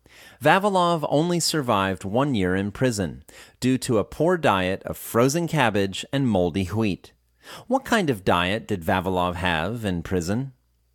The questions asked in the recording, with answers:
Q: What kind of diet did Vavilov have in prison?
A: In prison, he had a poor diet of frozen cabbage and moldy wheat.